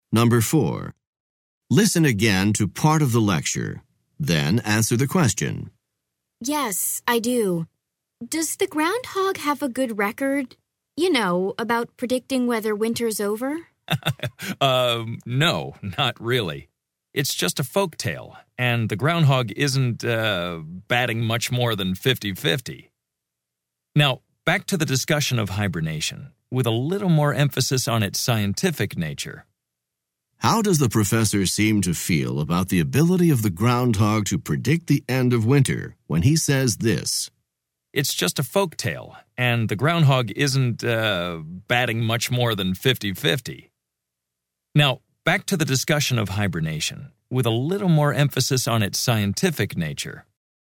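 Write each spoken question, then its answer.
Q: How does the professor seem to feel about the ability of the groundhog to predict the end of winter when he says this?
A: He is skeptical; he thinks it's just a folktale and no better than chance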